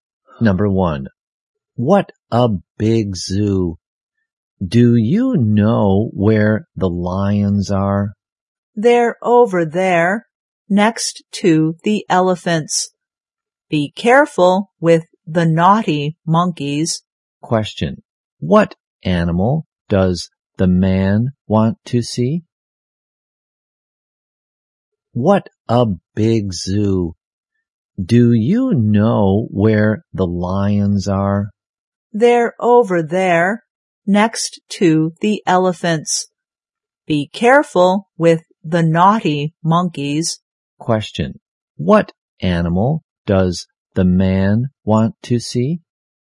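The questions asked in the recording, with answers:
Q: what animal does the man want to see?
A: Lions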